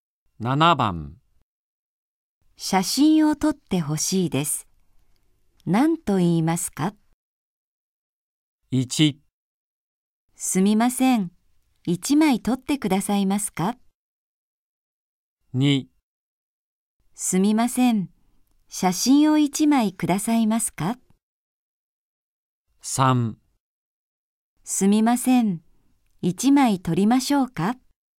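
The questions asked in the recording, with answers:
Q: 写真を撮ってほしいです。何と言いますか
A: 1: すみません。1枚撮ってくださいますか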